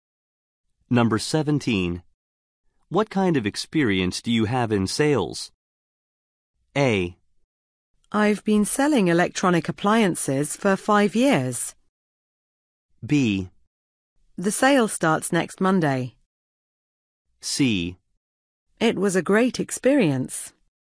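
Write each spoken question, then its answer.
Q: What kind of experience do you have in sales?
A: A: I've been selling electronic appliances for 5 years.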